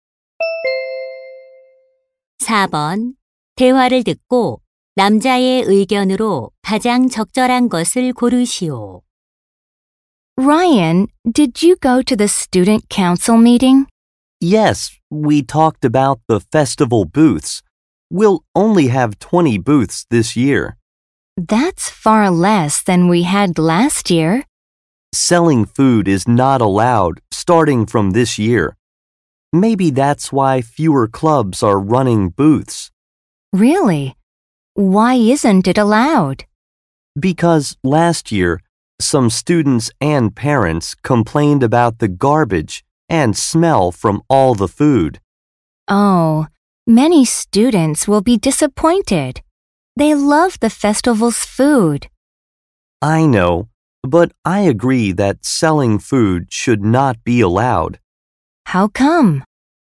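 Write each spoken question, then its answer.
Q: 대화를 듣고 남자의 의견으로 가장 적절한 것을 고르시오.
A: 학교 축제에서 음식 판매를 허용해서는 안 된다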